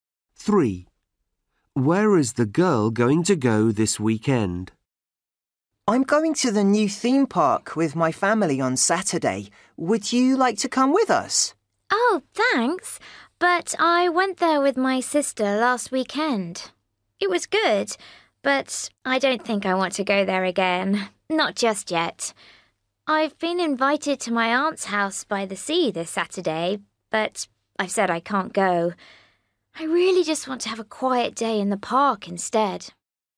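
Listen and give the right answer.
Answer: To the park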